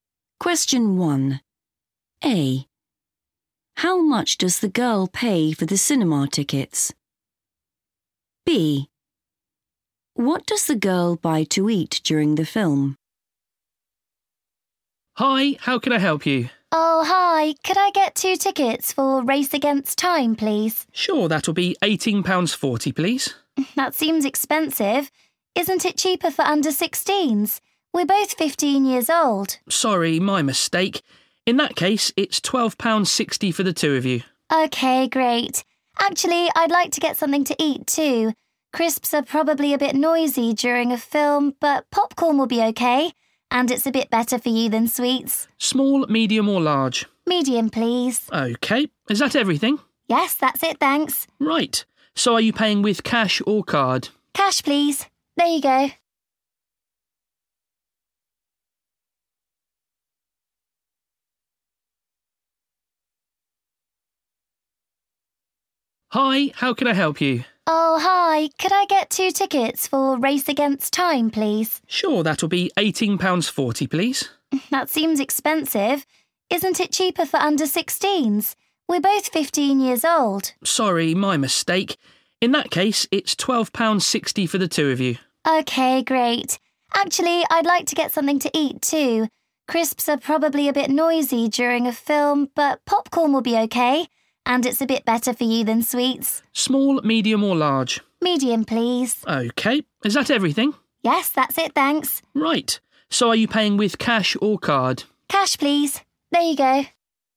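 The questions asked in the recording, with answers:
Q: How much does the girl pay for the cinema tickets?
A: £12.60

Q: What does the girl buy to eat during the film?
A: popcorn (medium)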